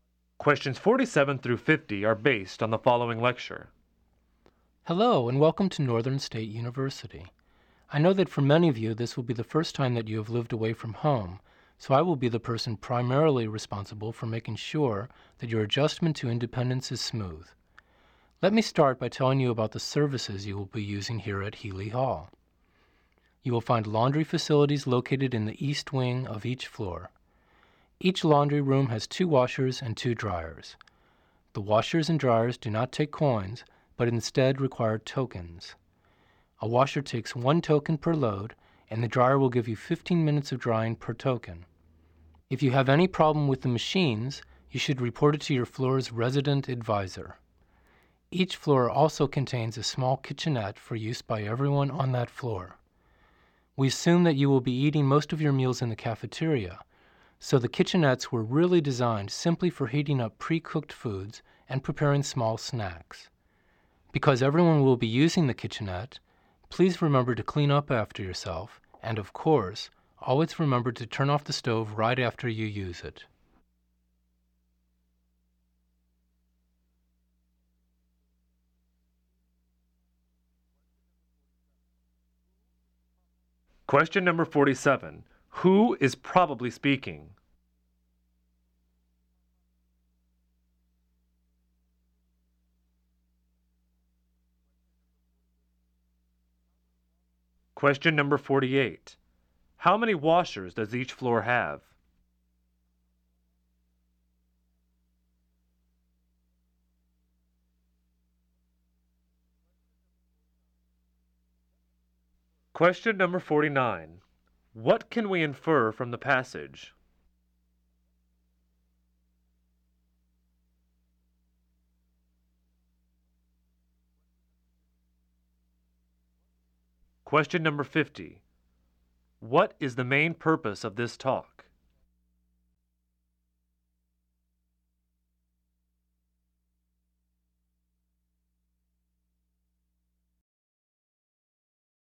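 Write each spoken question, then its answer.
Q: How many washers does each floor have?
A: Two

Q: What is the main purpose of this talk?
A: To tell new students about the services in their residence hall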